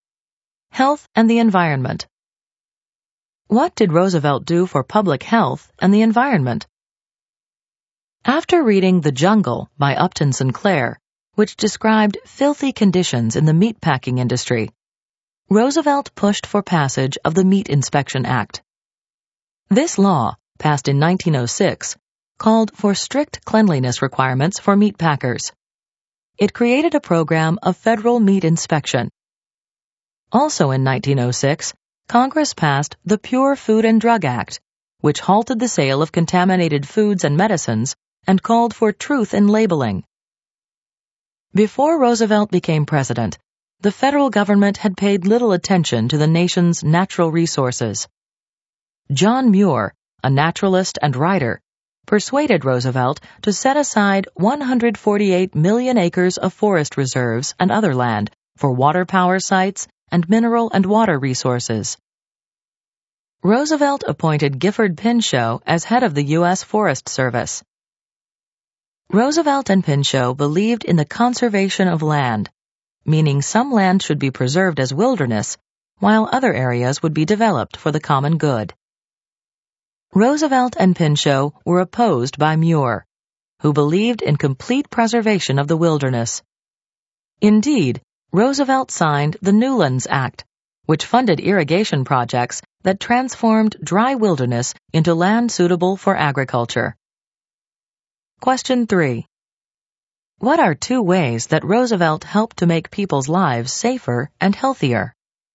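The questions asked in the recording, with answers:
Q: What are two ways that Roosevelt helped to make people's lives safer and healthier?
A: He pushed for the Meat Inspection Act and the Pure Food and Drug Act.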